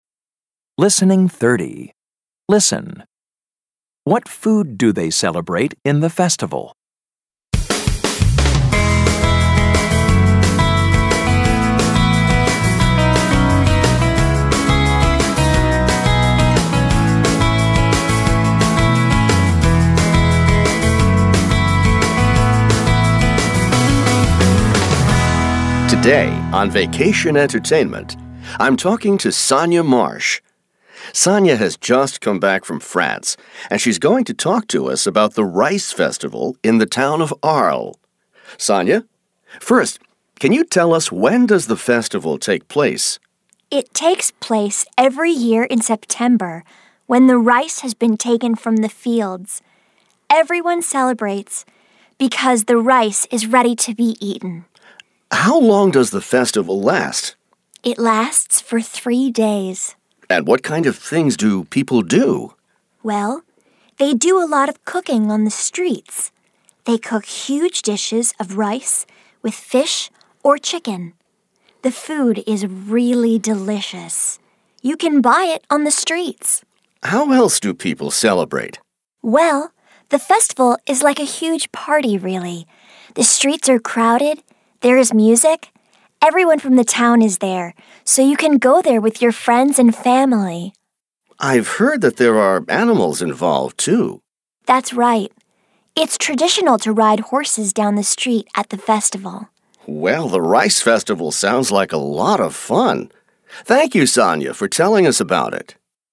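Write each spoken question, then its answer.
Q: What food do they celebrate in the festival?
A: Rice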